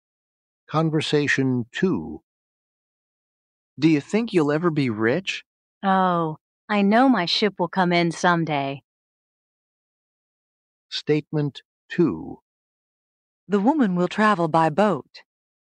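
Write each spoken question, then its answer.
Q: The woman will travel by boat.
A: False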